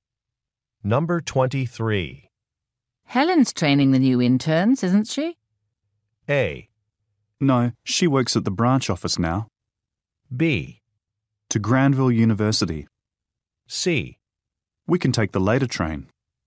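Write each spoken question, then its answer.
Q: Helen's training the new interns, isn't she?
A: A: No, she works at the branch office now.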